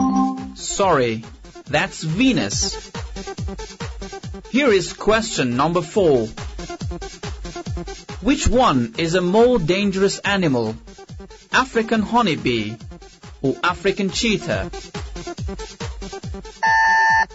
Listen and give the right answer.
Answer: That's African honeybee.